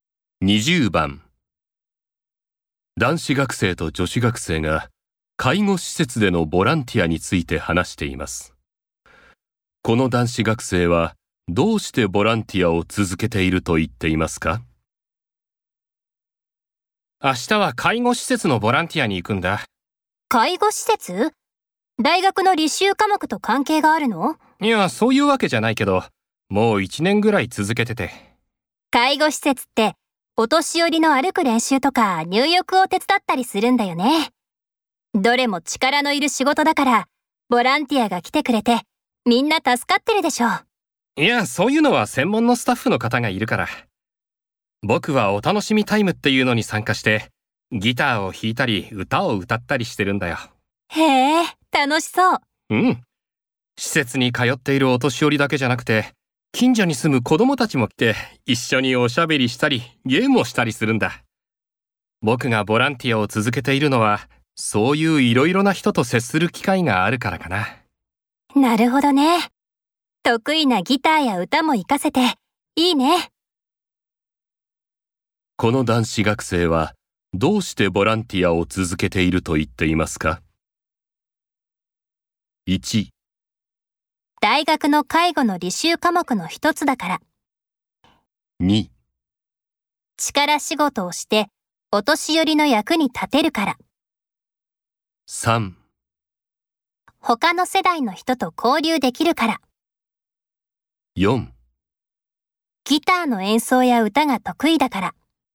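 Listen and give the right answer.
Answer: 3: 他の世代の人と交流できるから。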